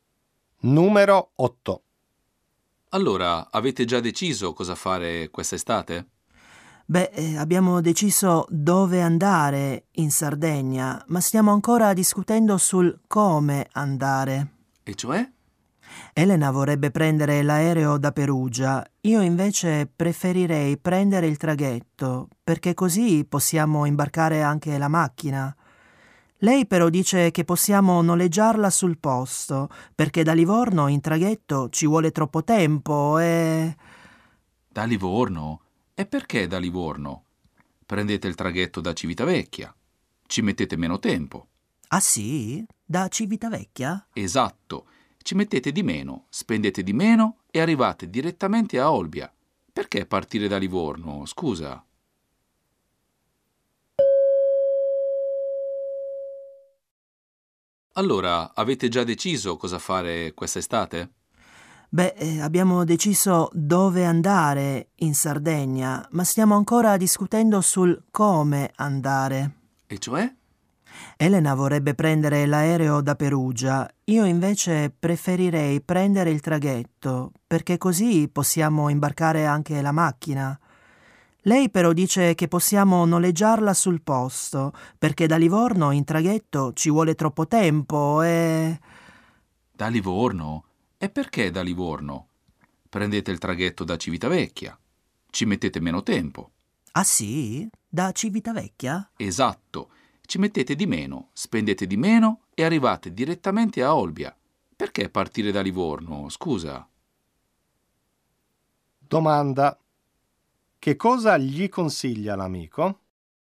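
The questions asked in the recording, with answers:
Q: Che cosa gli consiglia l'amico?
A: Di prendere il traghetto da Civitavecchia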